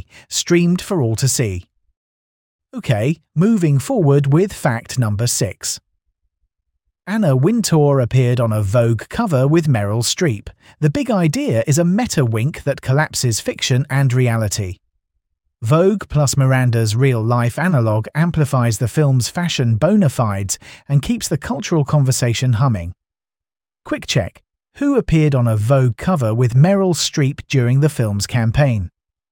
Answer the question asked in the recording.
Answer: Correct answer, Anna Wintour.